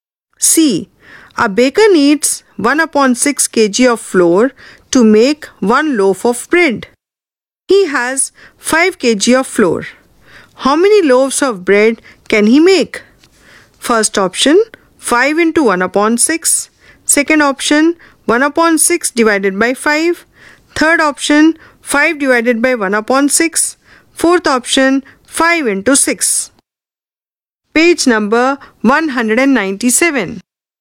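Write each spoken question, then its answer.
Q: How many loaves of bread can he make?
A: Third option: 5 divided by 1 upon 6 (30 loaves)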